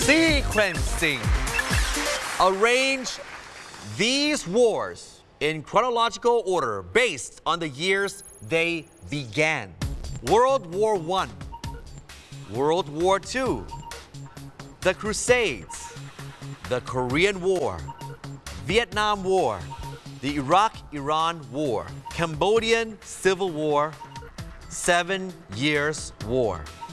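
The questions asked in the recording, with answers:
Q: arrange these wars in chronological order based on the years they began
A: The Crusades, Seven Years War, World War One, World War Two, the Korean War, Vietnam War, Cambodian Civil War, the Iraq-Iran War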